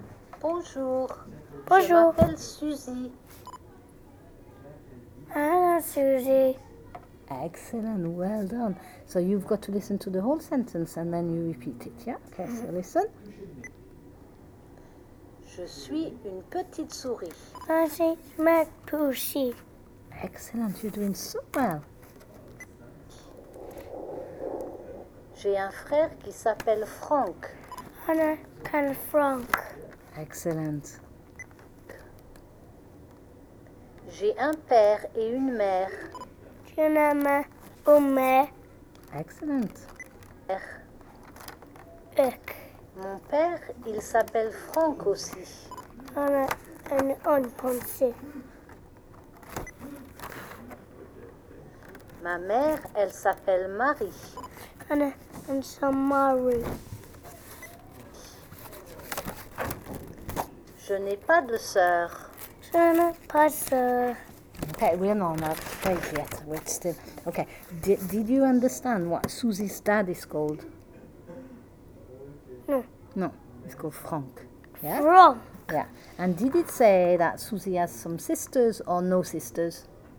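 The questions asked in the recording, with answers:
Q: And did it say that Susie has some sisters or no sisters?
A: No sisters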